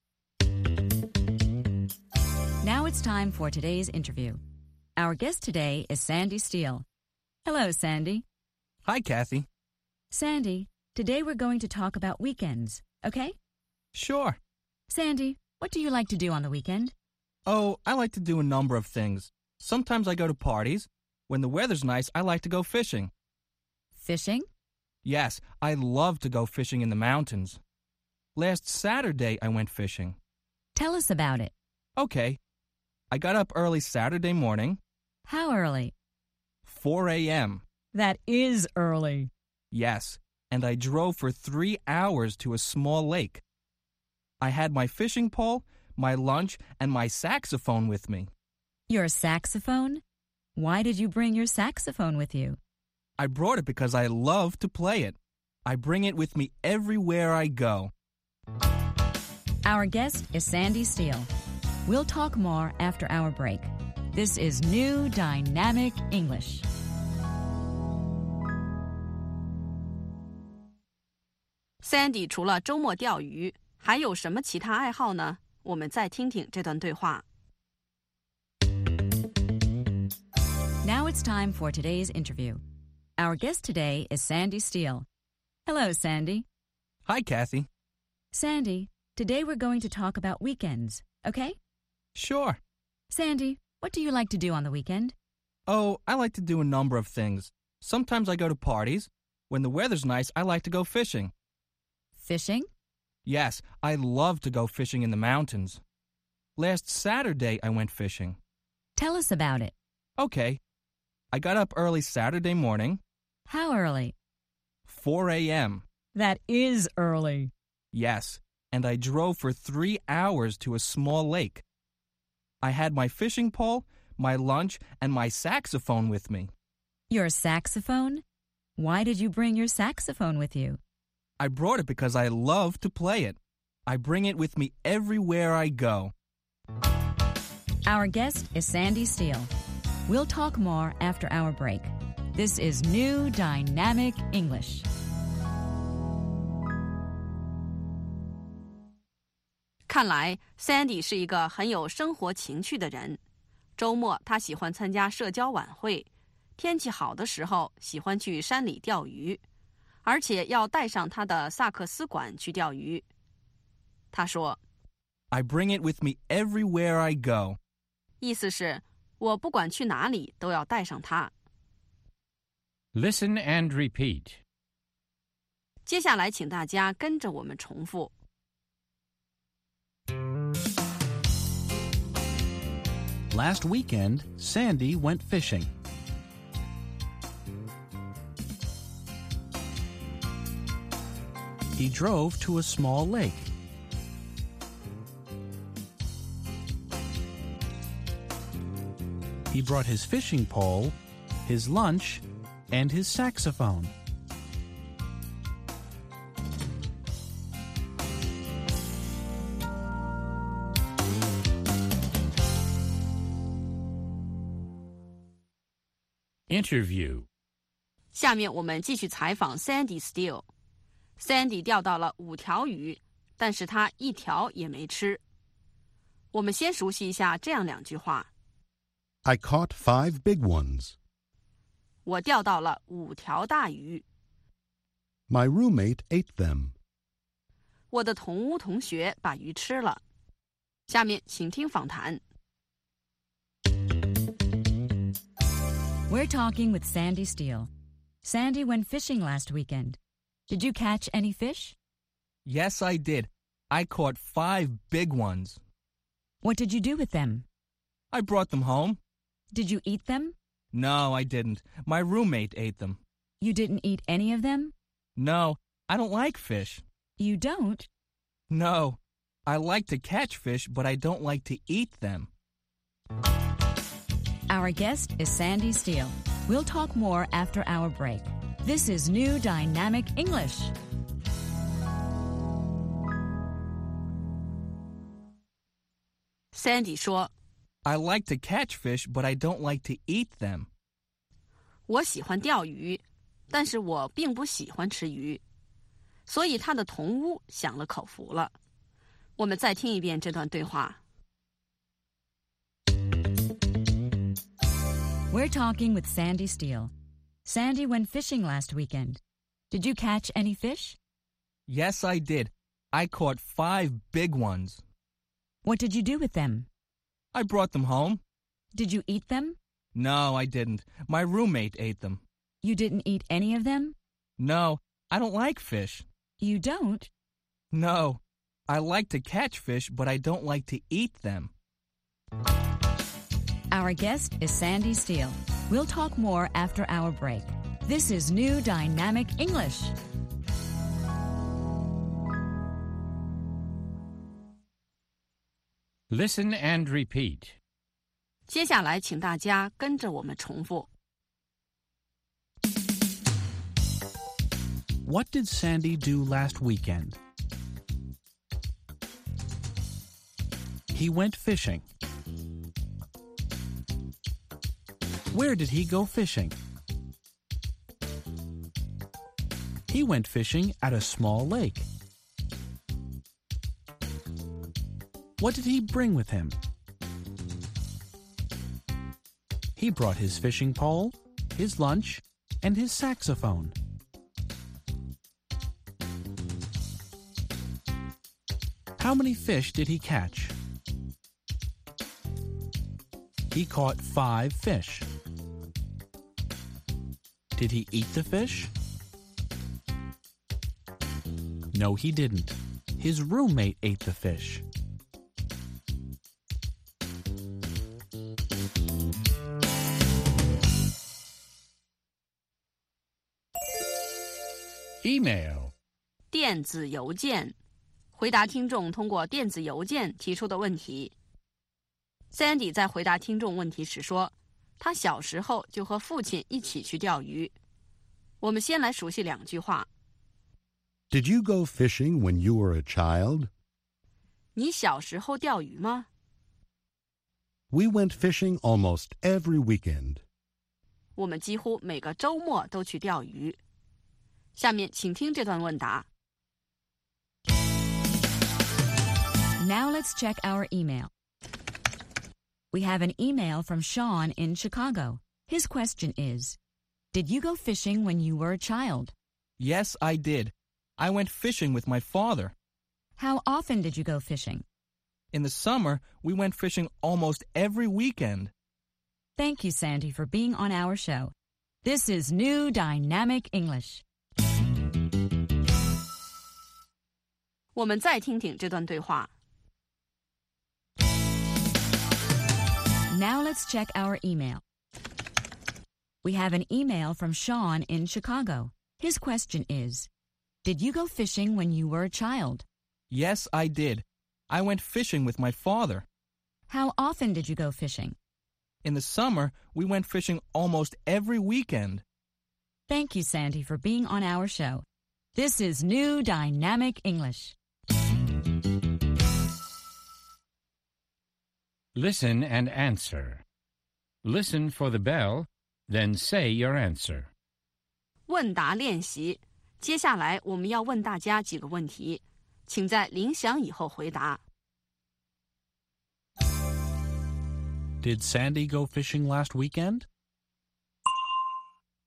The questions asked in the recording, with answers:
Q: Did Sandy go fishing last weekend?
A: Yes, he did. He went fishing on Saturday.